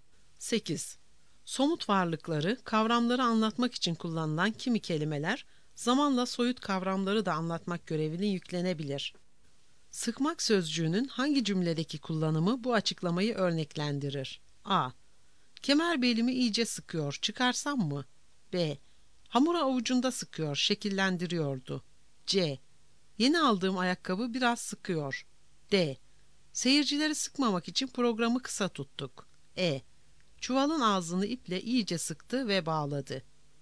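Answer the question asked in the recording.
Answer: D: Seyircileri sıkmamak için programı kısa tuttuk.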